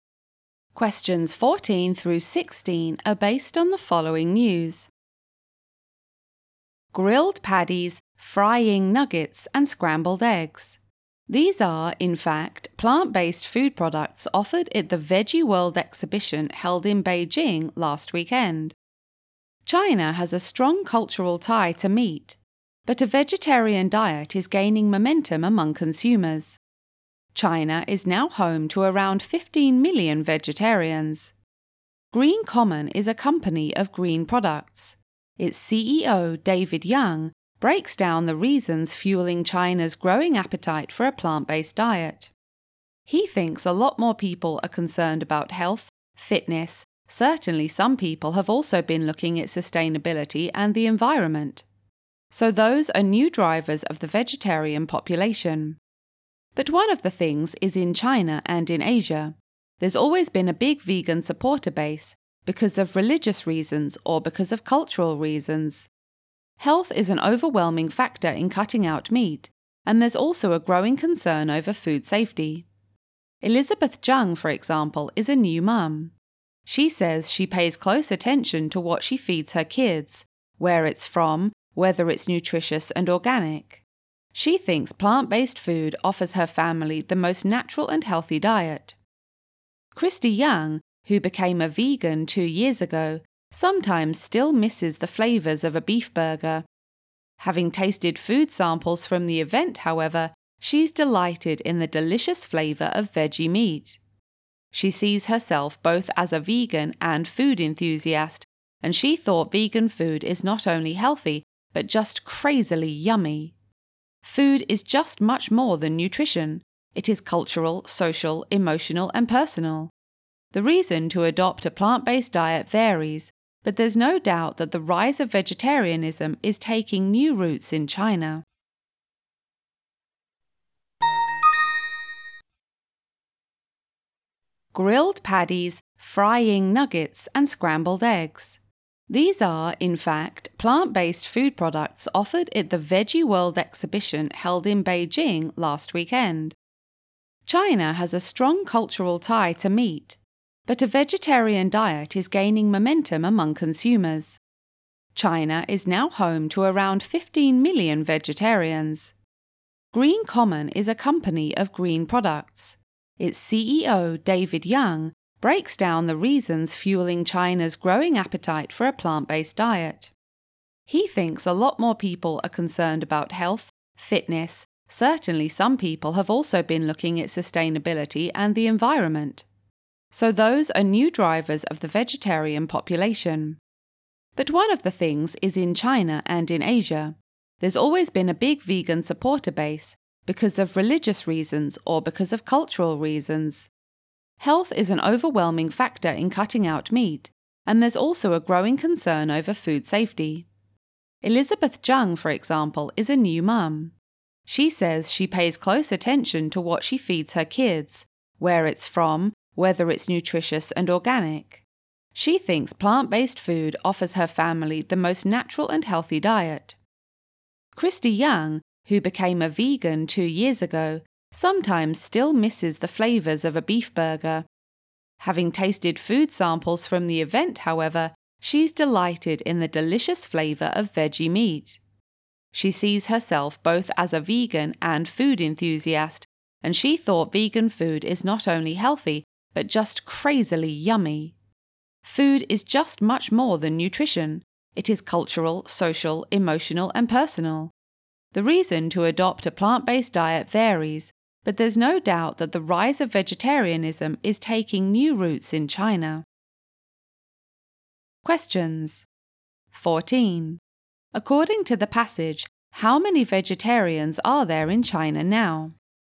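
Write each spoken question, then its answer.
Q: According to the passage, how many vegetarians are there in China now?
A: About 15 million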